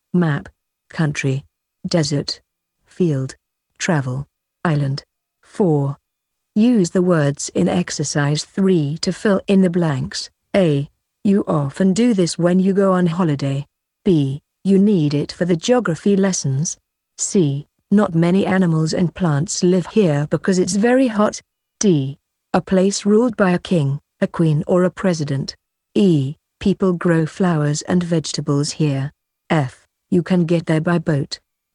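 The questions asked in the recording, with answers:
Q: You often do this when you go on holiday.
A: travel

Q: You need it for the geography lessons.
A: map

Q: Not many animals and plants live here because it's very hot.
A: desert

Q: A place ruled by a king, a queen or a president.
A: country

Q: People grow flowers and vegetables here.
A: field

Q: You can get there by boat.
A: island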